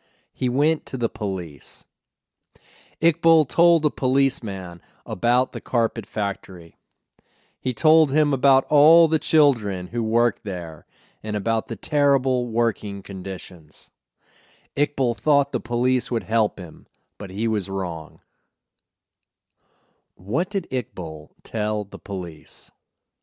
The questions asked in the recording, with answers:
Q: What did Iqbal tell the police?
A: Iqbal told the police about all the children who worked at the carpet factory and about the terrible working conditions.